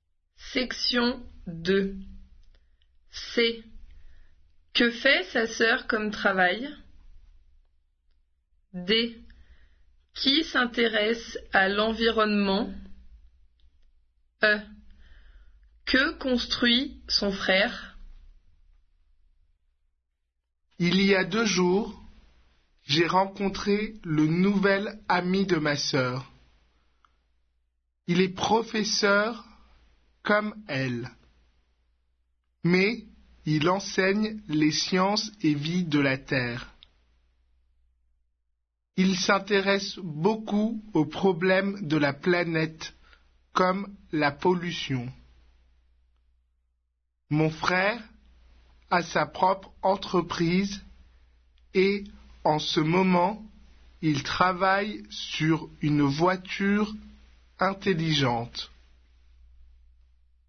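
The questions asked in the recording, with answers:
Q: Que fait sa sœur comme travail?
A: Elle est professeur

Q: Qui s'intéresse à l'environnement?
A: Le nouvel ami de sa sœur

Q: Que construit son frère?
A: Une voiture intelligente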